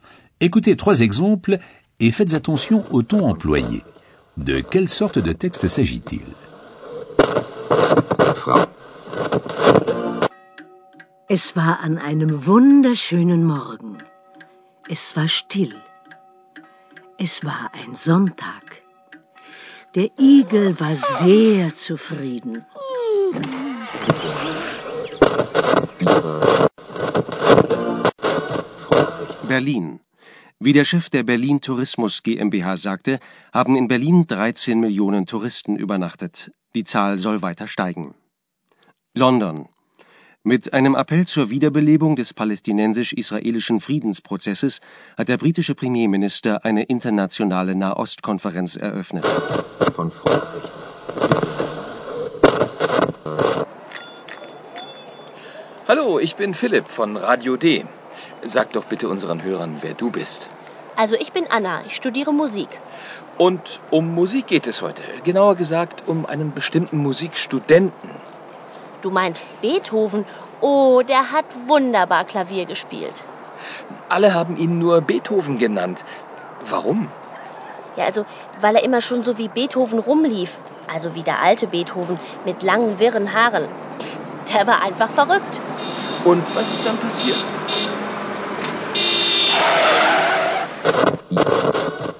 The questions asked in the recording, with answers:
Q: De quelle sorte de texte s'agit-il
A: Il s'agissait d'un conte qui captive l'auditeur et le transporte dans un monde imaginaire.